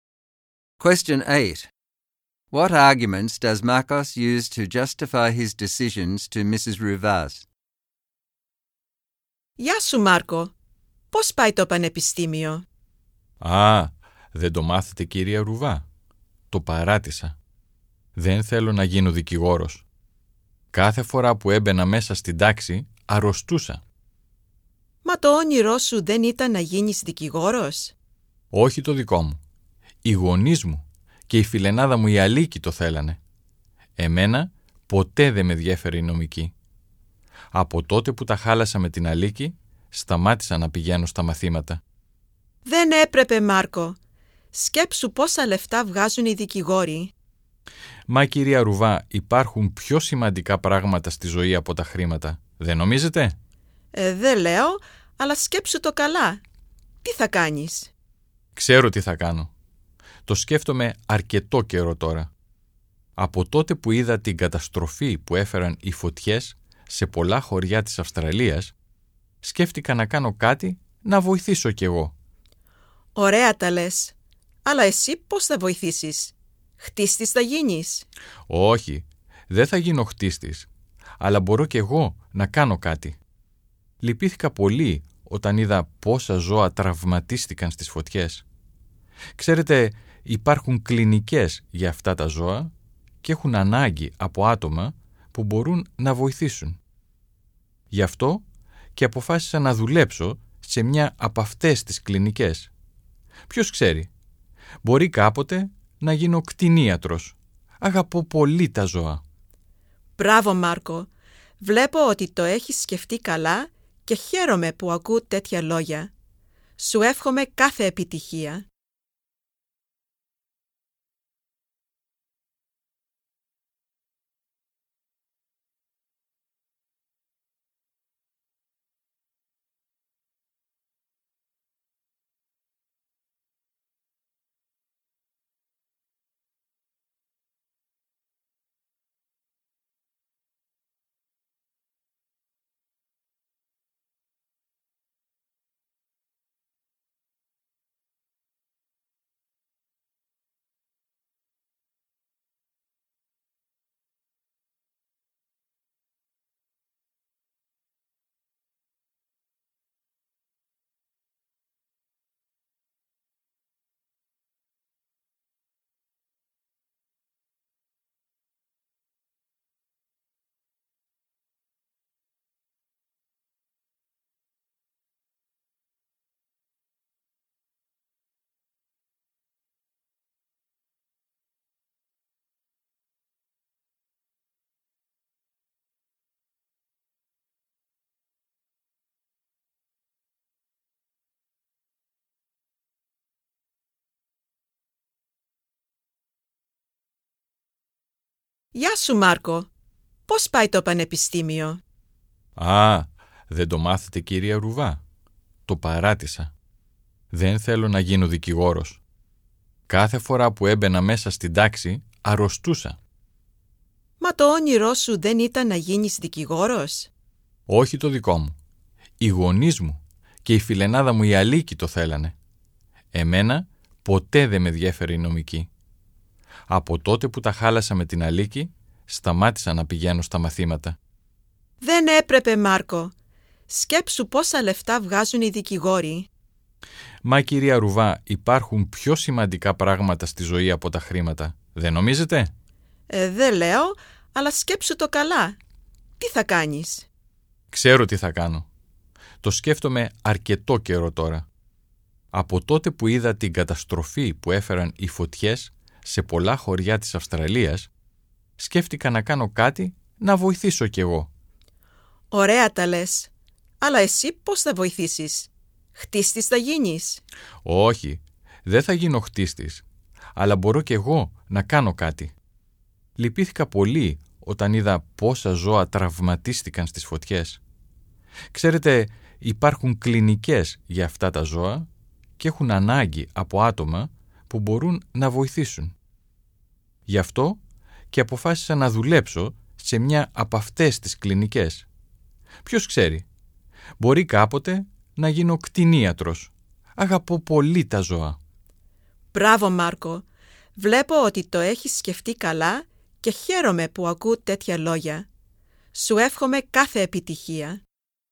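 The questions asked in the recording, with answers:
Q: What arguments does Marcos use to justify his decisions to Mrs.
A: He felt sick every time he went into class. Becoming a lawyer was his parents' and Aliki's dream, not his, and law never interested him. There are more important things in life than money. After the fires in Australia he wanted to help, so he will work in a clinic for injured animals, perhaps become a vet one day, and he loves animals.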